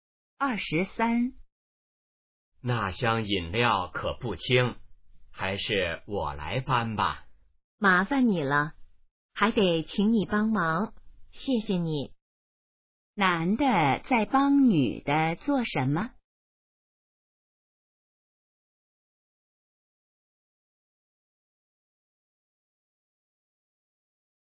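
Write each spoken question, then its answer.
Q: 男的在帮女的做什么?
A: 搬饮料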